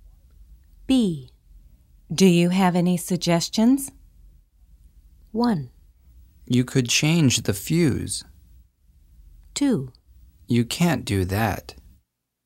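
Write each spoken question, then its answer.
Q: Do you have any suggestions?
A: 1: You could change the fuse.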